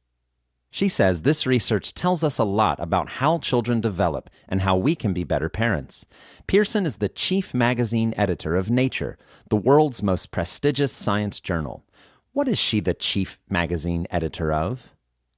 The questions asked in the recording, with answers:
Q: What is she the chief magazine editor of?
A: She is the chief magazine editor of Nature.